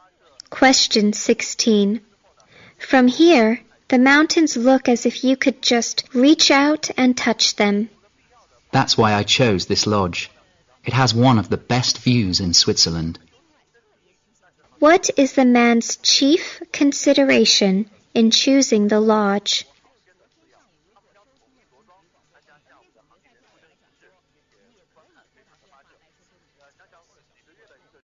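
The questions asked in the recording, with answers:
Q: What is the man's chief consideration in choosing the lodge?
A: The view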